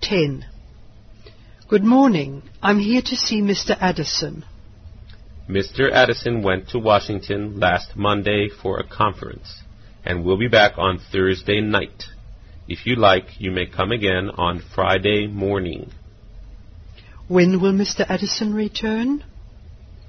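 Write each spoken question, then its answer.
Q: When will Mr. Addison return?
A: On Thursday night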